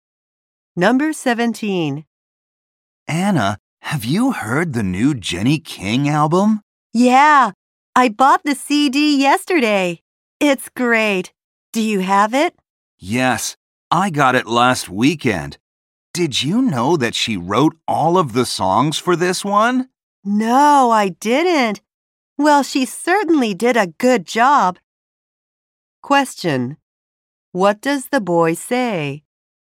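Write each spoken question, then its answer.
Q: What does the boy say?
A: He bought the CD last weekend.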